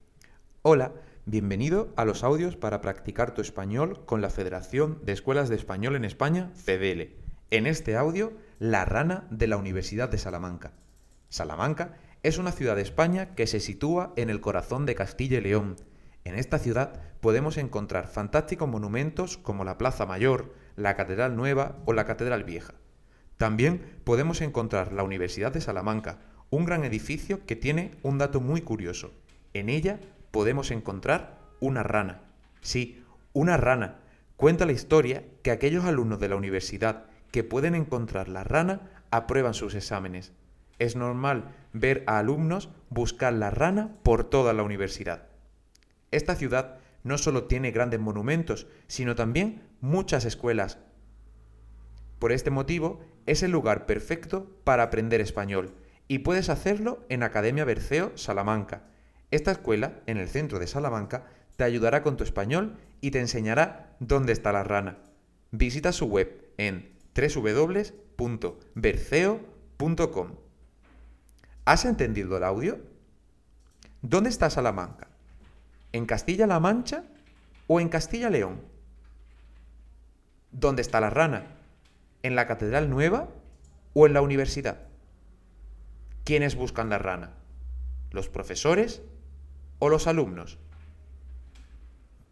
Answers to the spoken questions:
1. Castilla-León
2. universidad
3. los alumnos